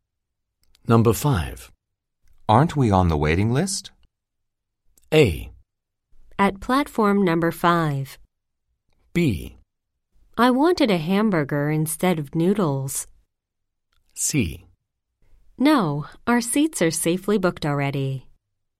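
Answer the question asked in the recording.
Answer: C: No, our seats are safely booked already.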